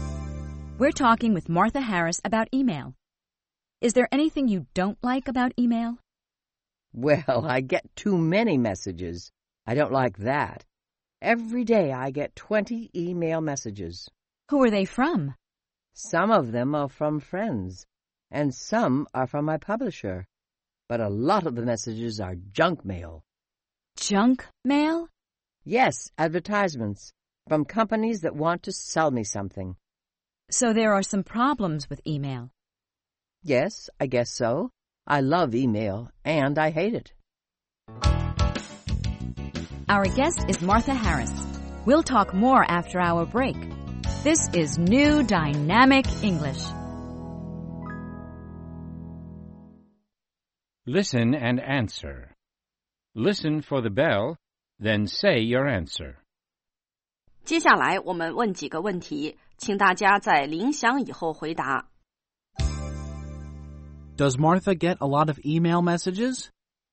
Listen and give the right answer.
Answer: Yes, she gets too many messages.